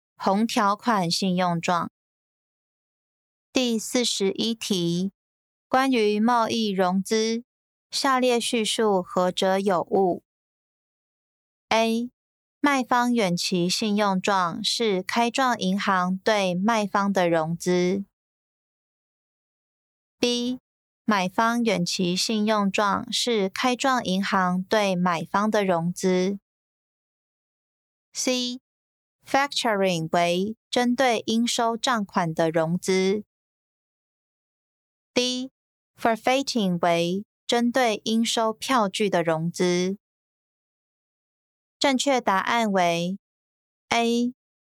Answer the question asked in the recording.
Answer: 正确答案为 A.